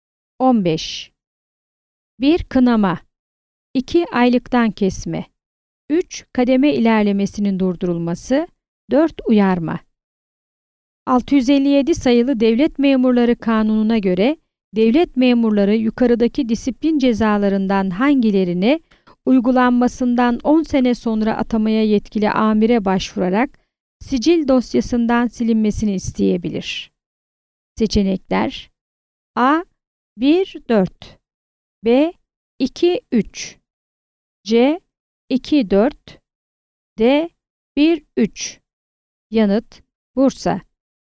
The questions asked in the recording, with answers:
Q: 657 sayılı Devlet Memurları Kanunu'na göre devlet memurları yukarıdaki disiplin cezalarından hangilerini uygulanmasından 10 sene sonra atamaya yetkili amire başvurarak sicil dosyasından silinmesini isteyebilir?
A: Yanıt: Bursa.